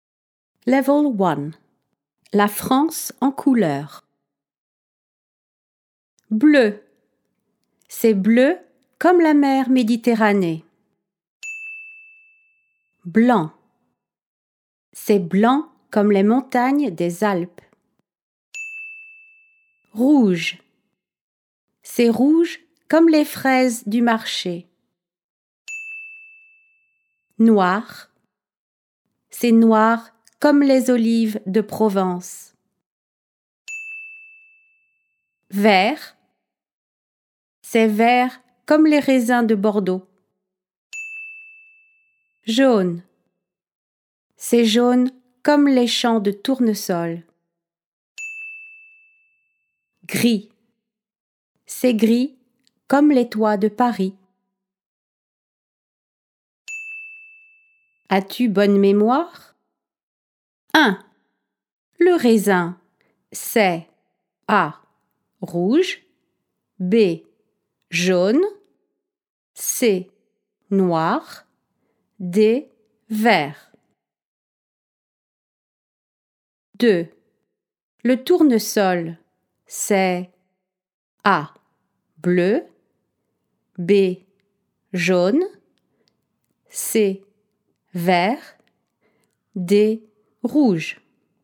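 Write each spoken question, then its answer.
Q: Le raisin, c'est A. Rouge. B. Jaune. C. Noir. D. Vert.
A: D: Vert

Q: Le tournesol, c'est A. Bleu. B. Jaune. C. Vert. D. Rouge.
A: B: Jaune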